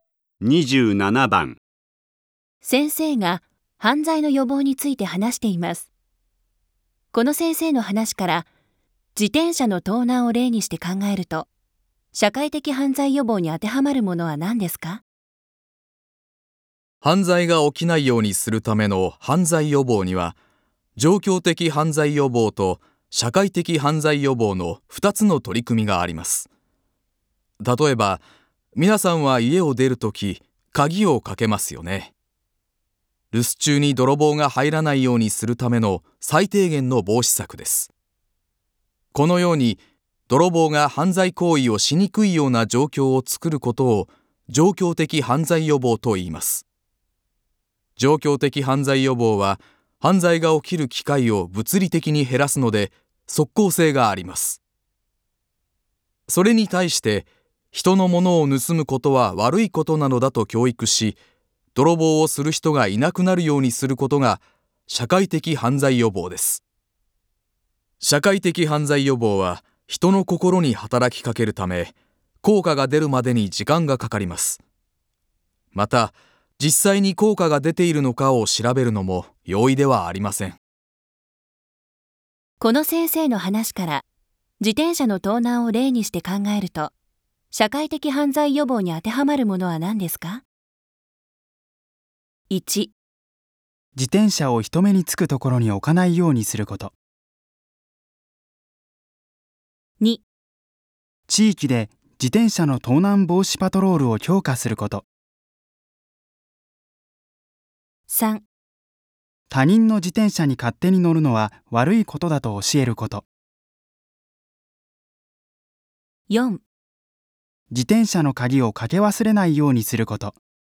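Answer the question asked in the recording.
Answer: 3: 他人の自転車に勝手に乗るのは悪いことだと教えること。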